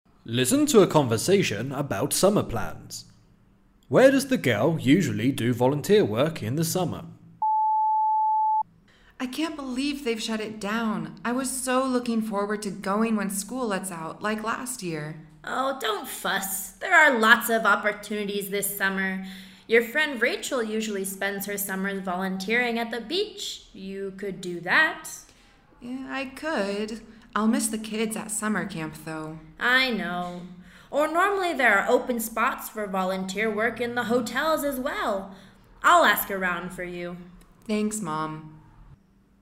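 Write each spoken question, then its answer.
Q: Where does the girl usually do volunteer work in the summer?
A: At a summer camp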